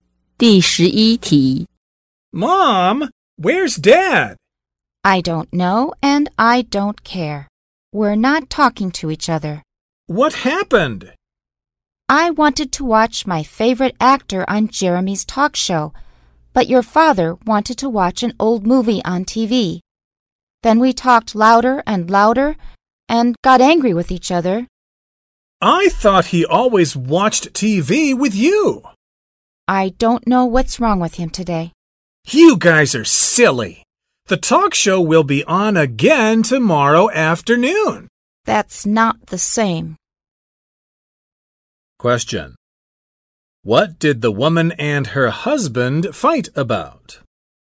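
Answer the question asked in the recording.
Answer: What to watch on TV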